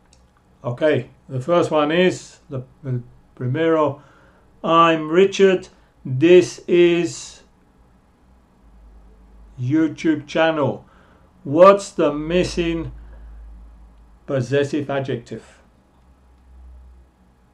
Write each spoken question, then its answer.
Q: What's the missing possessive adjective?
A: And the answer is my